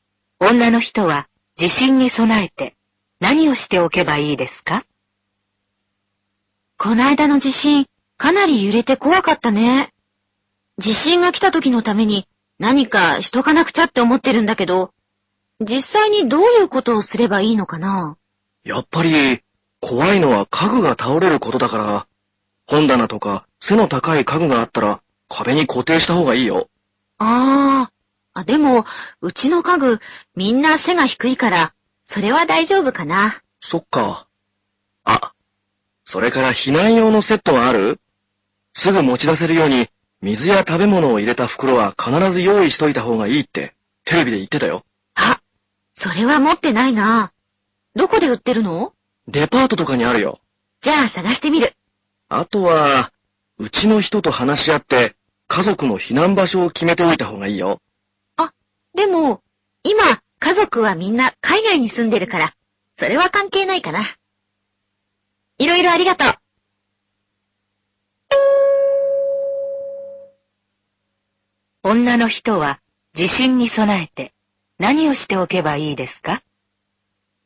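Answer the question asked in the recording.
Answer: 水や食べ物を入れた避難用の袋を用意する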